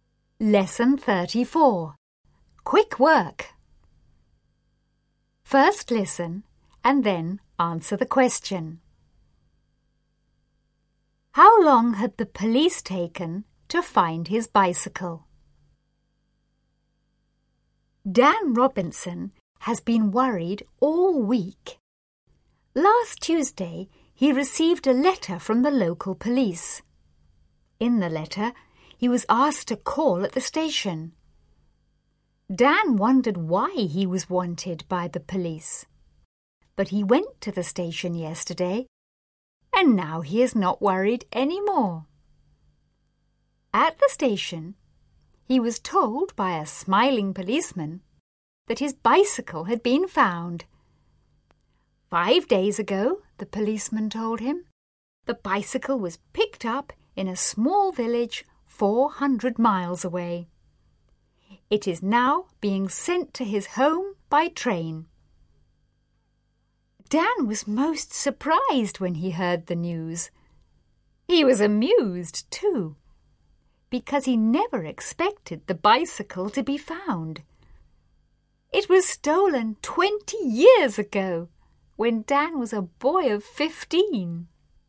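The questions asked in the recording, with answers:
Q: How long had the police taken to find his bicycle?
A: About 20 years (it was stolen 20 years ago)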